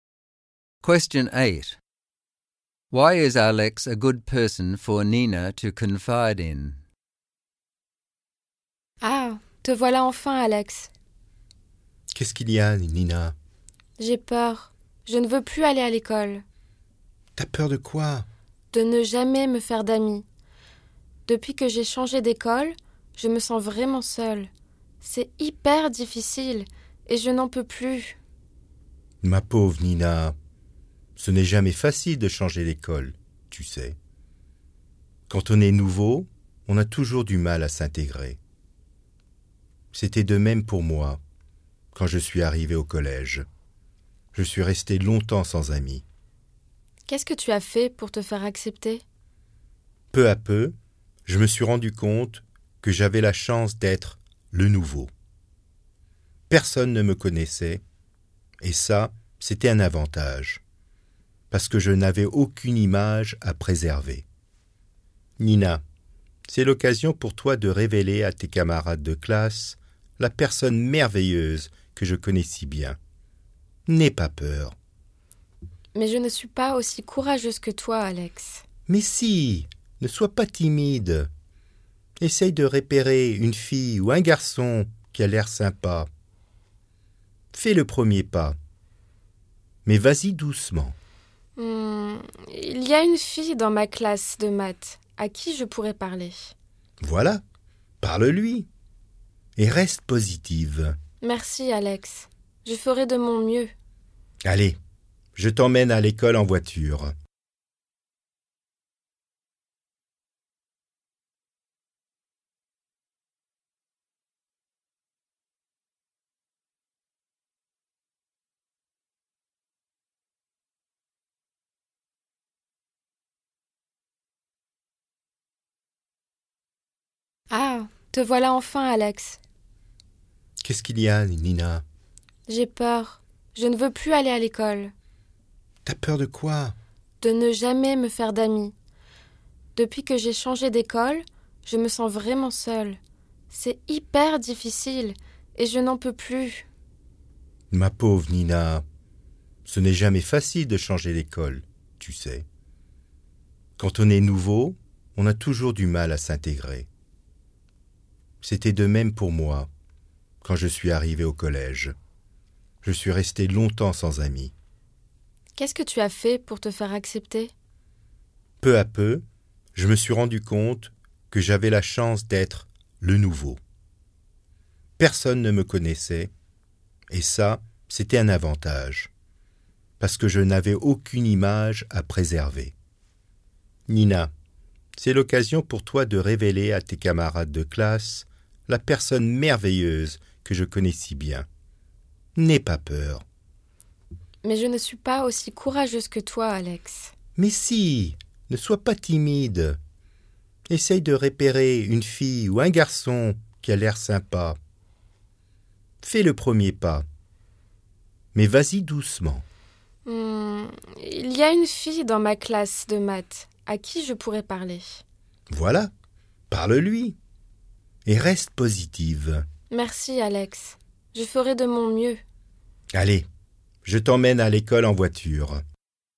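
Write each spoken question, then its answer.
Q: Why is Alex a good person for Nina to confide in?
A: Alex went through the same thing as the new student at school and had no friends for a long time, knows Nina well, and gives her practical, positive advice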